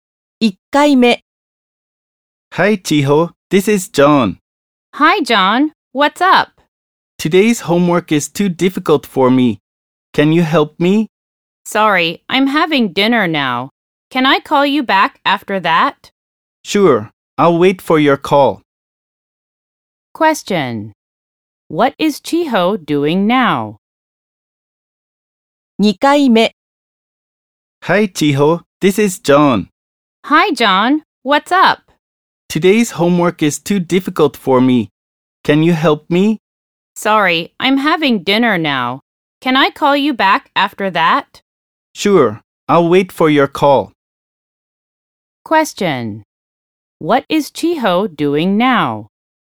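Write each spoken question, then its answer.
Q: What is Chiho doing now?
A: Having dinner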